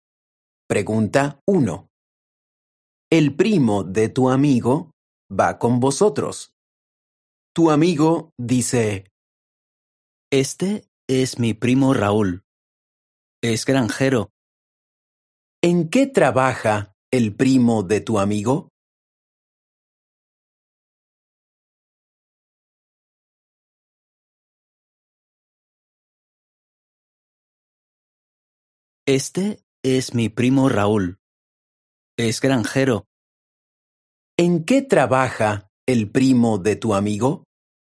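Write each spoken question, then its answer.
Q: ¿En qué trabaja el primo de tu amigo?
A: Es granjero.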